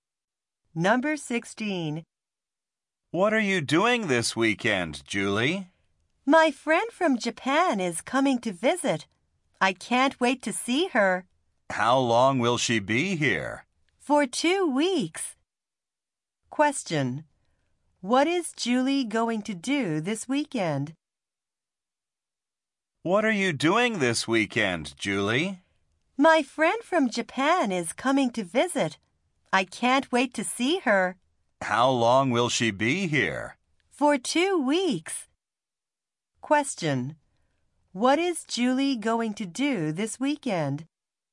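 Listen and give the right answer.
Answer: See her friend from Japan who is coming to visit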